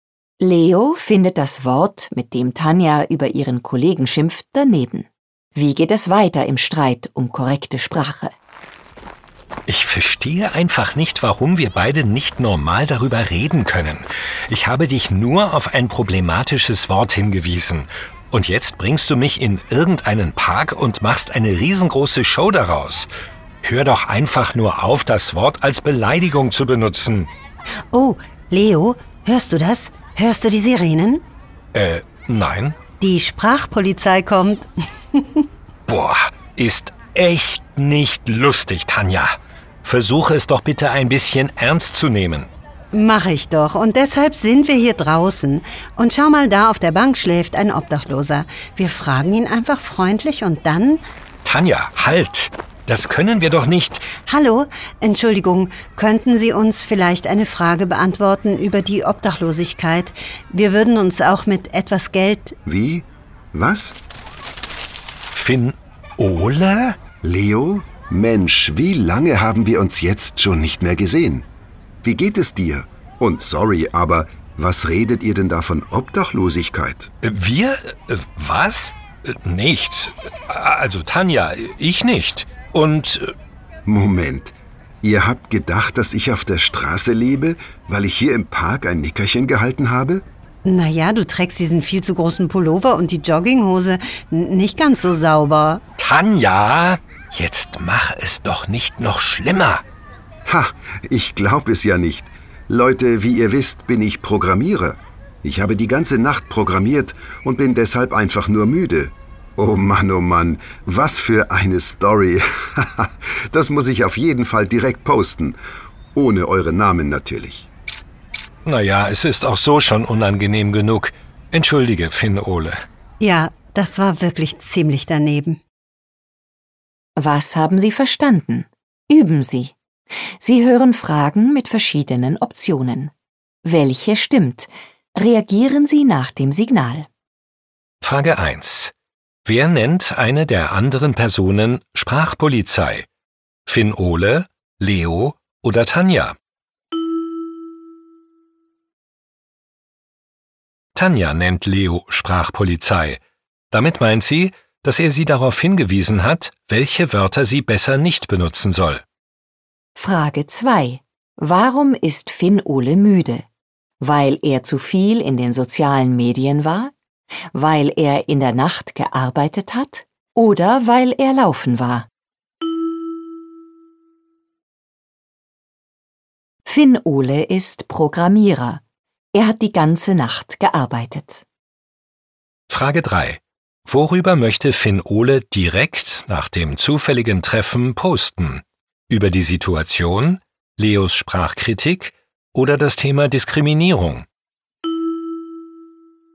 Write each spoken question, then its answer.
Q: Wer nennt eine der anderen Personen Sprachpolizei?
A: Tanja nennt Leo Sprachpolizei.

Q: Warum ist Finn-Ole müde?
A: Finn-Ole ist Programmierer.

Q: Worüber möchte Finn-Ole direkt nach dem zufälligen Treffen posten?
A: Finn-Ole möchte über die lustige Situation posten.